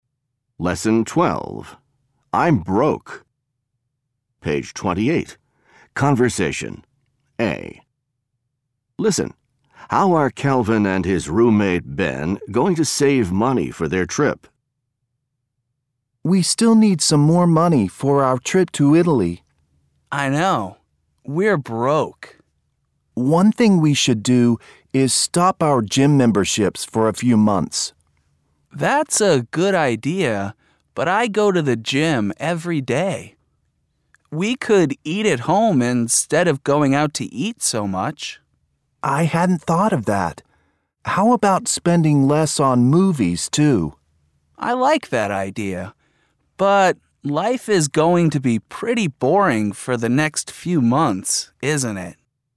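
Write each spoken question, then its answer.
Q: How are Calvin and his roommate Ben going to save money for their trip?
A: By stopping their gym memberships, eating at home instead of going out, and spending less on movies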